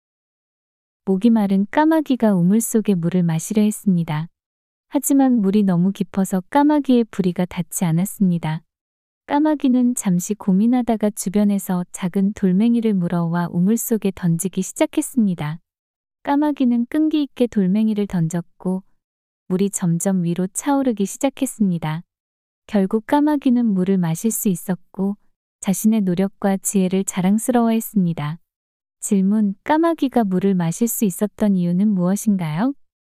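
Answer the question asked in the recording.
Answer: 돌멩이를 우물 속에 던져 물이 위로 차올랐기 때문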